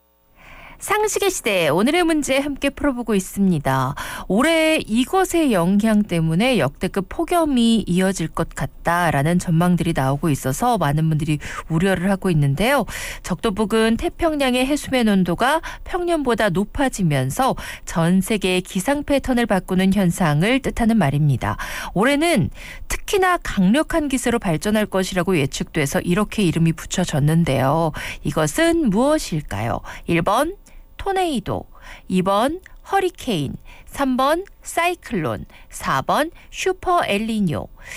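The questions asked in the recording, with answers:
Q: 이것은 무엇일까요?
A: 4: 슈퍼 엘니뇨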